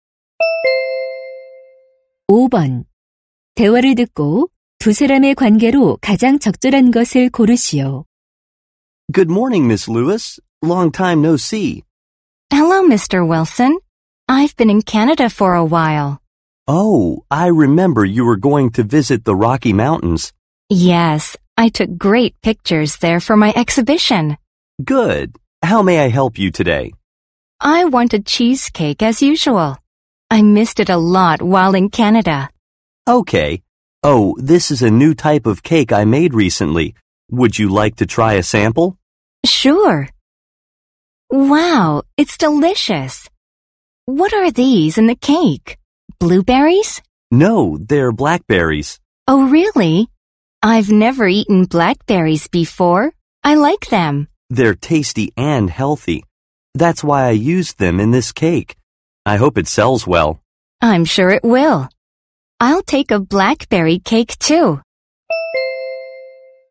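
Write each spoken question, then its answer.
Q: 대화를 듣고 두 사람의 관계로 가장 적절한 것을 고르시오.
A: 사진작가 - 제과점 주인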